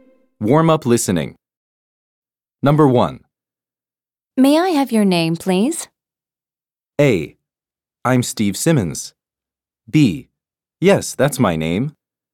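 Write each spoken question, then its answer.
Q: May I have your name, please?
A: A: I'm Steve Simmons.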